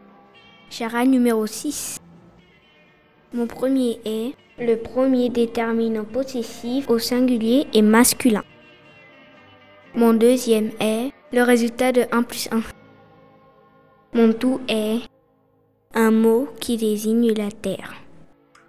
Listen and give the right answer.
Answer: monde.